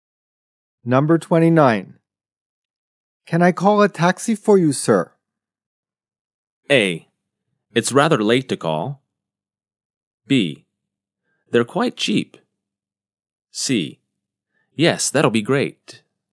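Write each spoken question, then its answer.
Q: Can I call a taxi for you, sir?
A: C: Yes, that'll be great.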